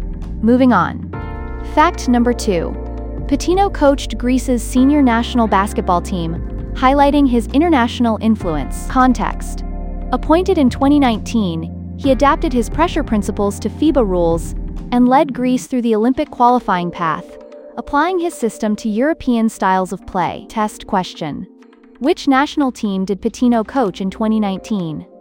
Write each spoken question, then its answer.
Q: Which national team did Pitino coach in 2019?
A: Greece.